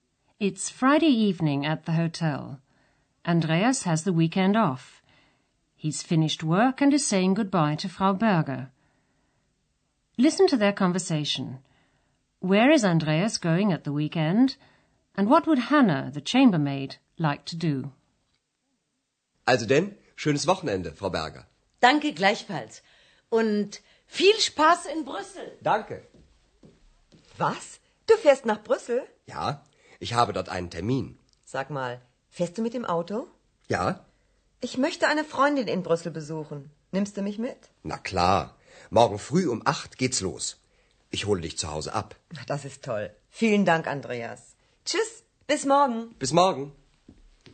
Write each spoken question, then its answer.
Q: Where is Andreas going at the weekend?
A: Andreas is going to Brussels at the weekend.

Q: And what would Hannah, the chambermaid, like to do?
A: Hannah would like to go with him because she wants to visit a girlfriend who lives there.